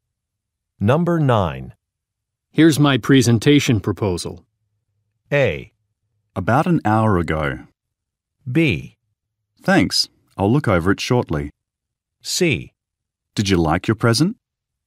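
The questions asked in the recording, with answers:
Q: Here's my presentation proposal.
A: B: Thanks, I'll look over it shortly.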